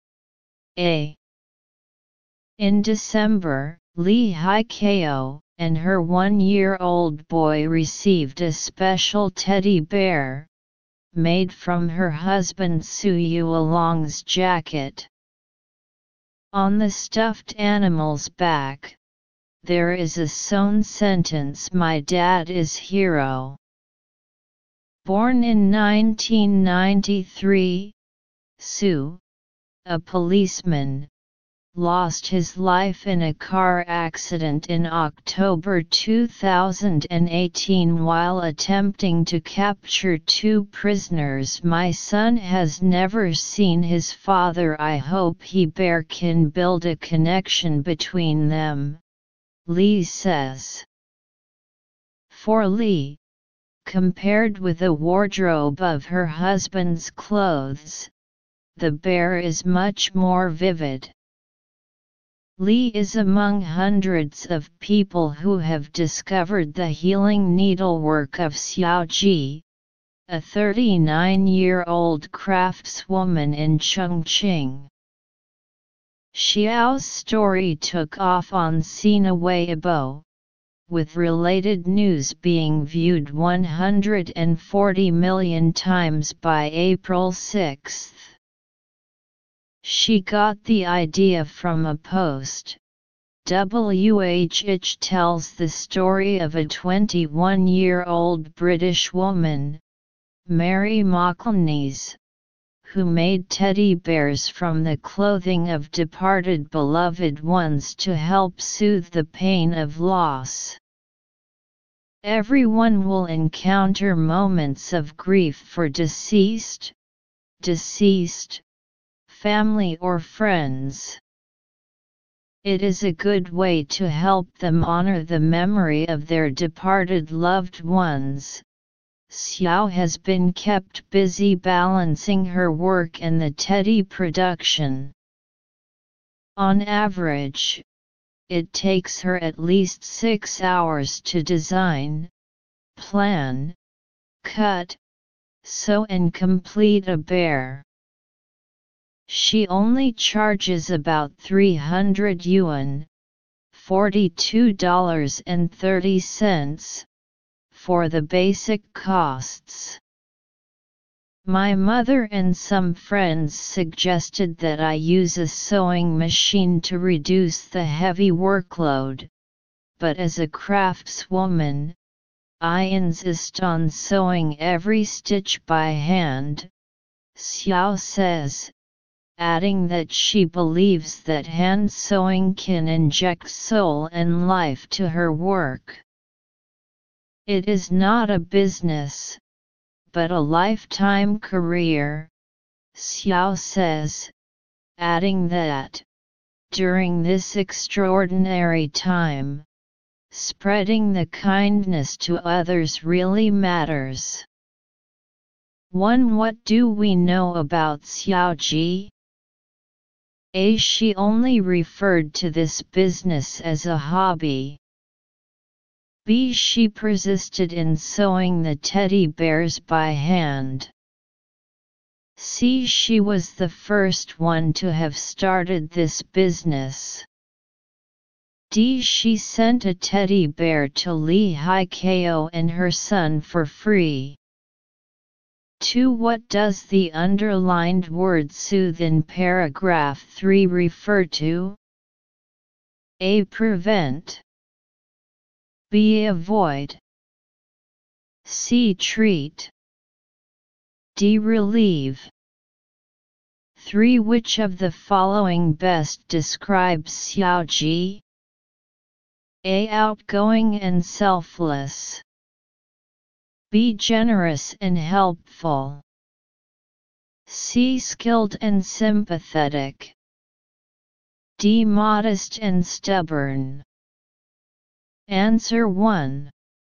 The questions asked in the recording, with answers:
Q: What does the underlined word soothe in paragraph 3 refer to?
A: 2. D.

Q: Which of the following best describes Xiao Ji?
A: 3. C.